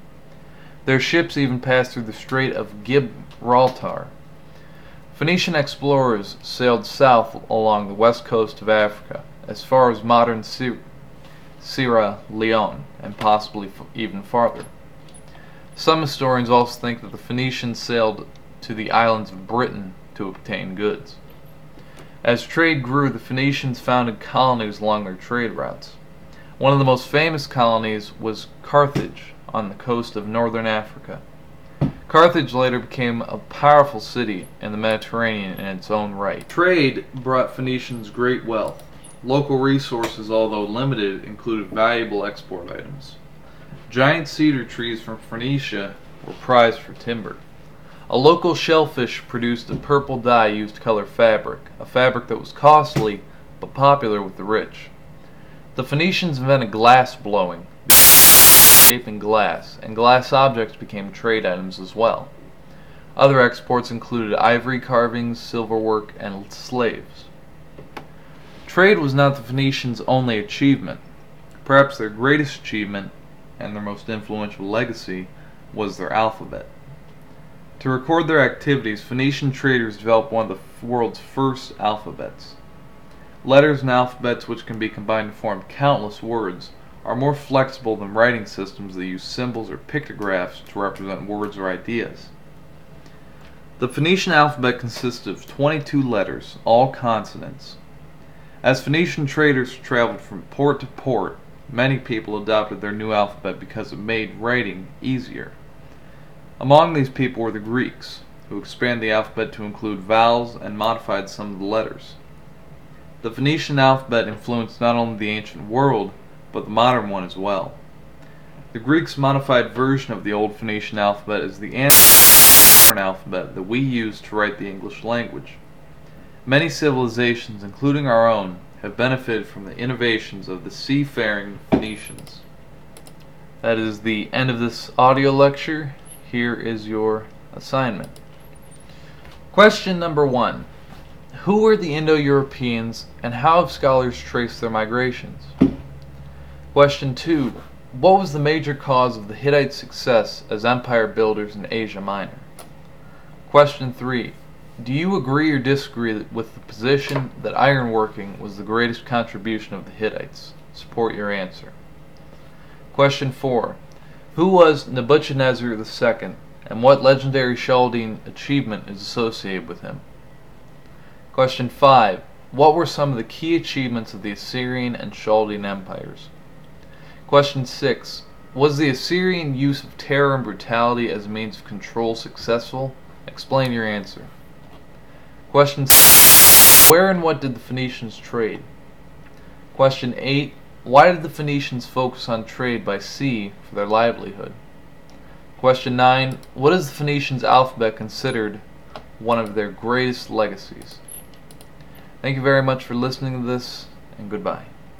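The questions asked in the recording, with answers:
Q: What is the Phoenicians' alphabet considered one of their greatest legacies?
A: It made writing easier and more flexible. It spread widely, and the Greeks adapted it into the alphabet used for English today.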